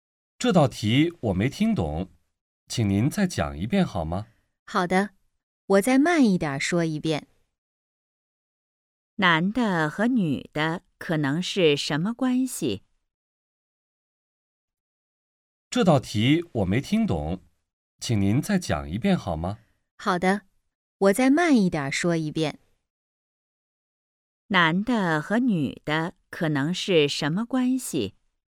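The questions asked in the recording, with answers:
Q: 男的和女的可能是什么关系?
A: 学生和老师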